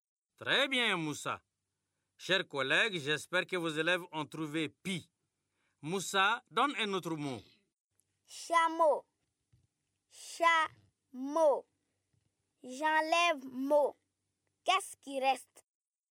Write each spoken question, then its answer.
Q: Qu'est-ce qui reste?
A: C'est chat, monsieur.